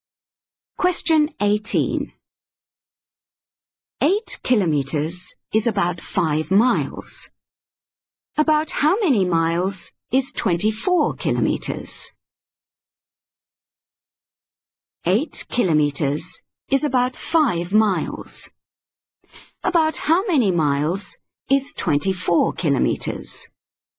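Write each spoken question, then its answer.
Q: About how many miles is 24 kilometers?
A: 15 miles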